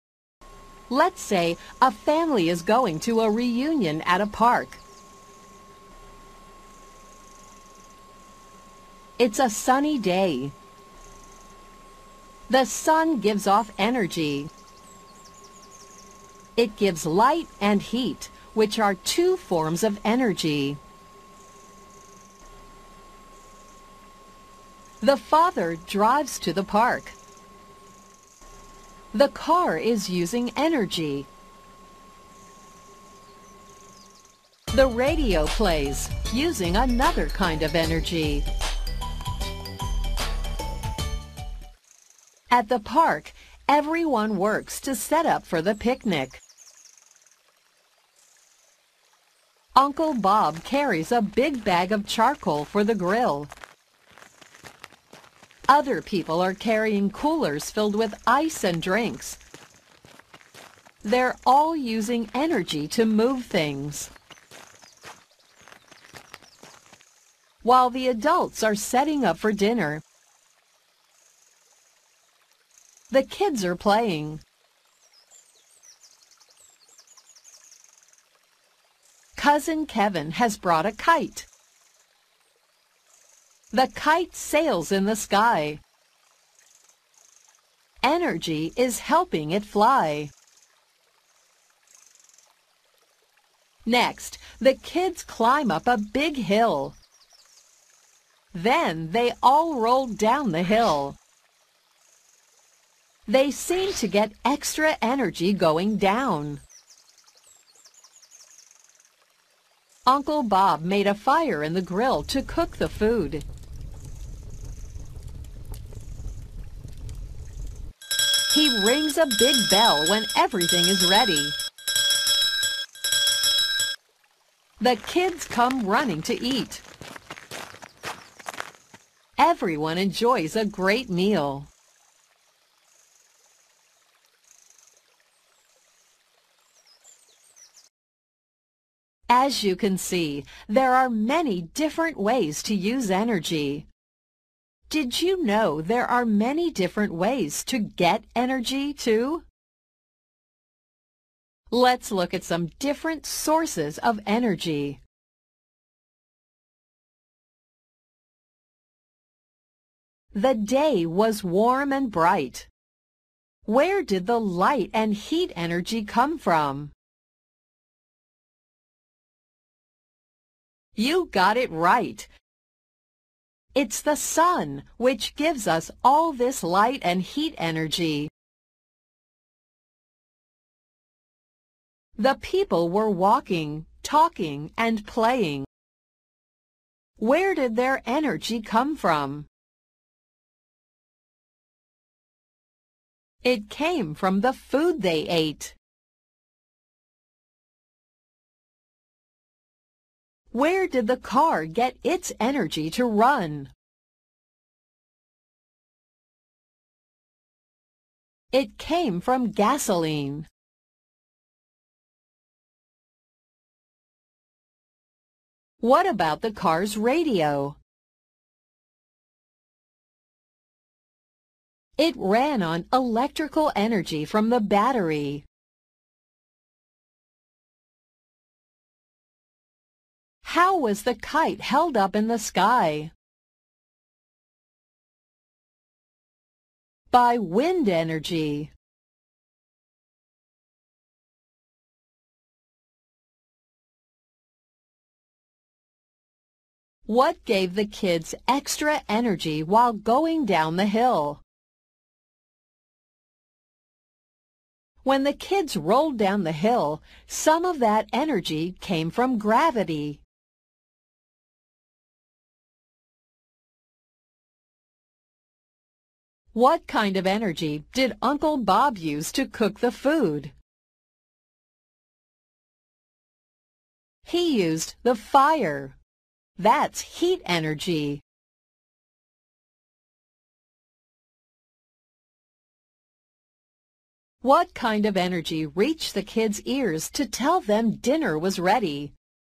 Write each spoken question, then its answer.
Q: Where did the light and heat energy come from?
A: It's the sun which gives us all this light and heat energy.

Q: Where did their energy come from?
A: It came from the food they ate.

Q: Where did the car get its energy to run?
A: It came from gasoline.

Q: What about the car's radio?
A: It ran on electrical energy from the battery.

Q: How was the kite held up in the sky?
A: By wind energy.

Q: What gave the kids extra energy while going down the hill?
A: some of that energy came from gravity.

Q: What kind of energy did Uncle Bob use to cook the food?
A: He used the fire. That's heat energy.